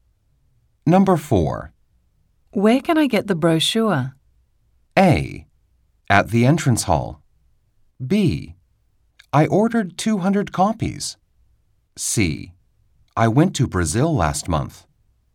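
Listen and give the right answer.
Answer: A: At the entrance hall.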